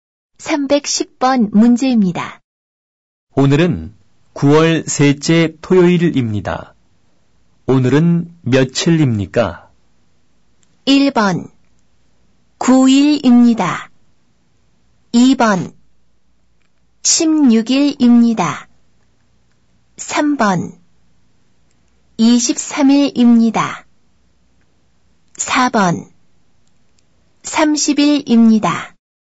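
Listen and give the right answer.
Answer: 2: 16일입니다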